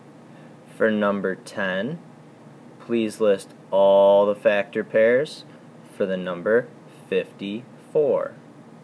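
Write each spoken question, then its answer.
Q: For number 10, please list all the factor pairs for the number 54.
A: 1 and 54, 2 and 27, 3 and 18, 6 and 9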